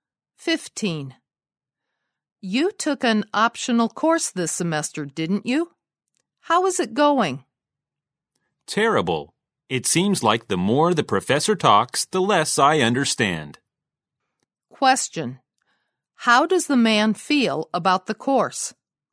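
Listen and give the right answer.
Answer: He finds it very hard to understand.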